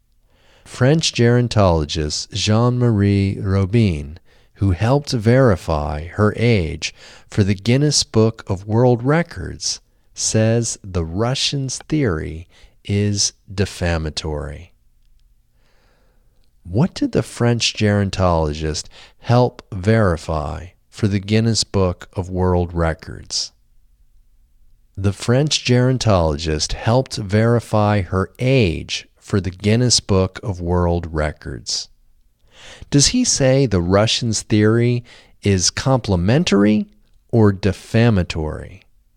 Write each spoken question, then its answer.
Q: What did the French gerontologist help verify for the Guinness Book of World Records?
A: The French gerontologist helped verify her age for the Guinness Book of World Records.

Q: Does he say the Russians' theory is complimentary or defamatory?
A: He says the Russians' theory is defamatory.